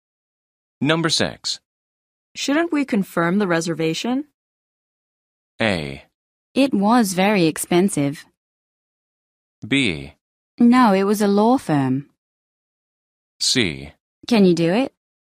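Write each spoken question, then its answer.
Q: Shouldn't we confirm the reservation?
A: C: Can you do it?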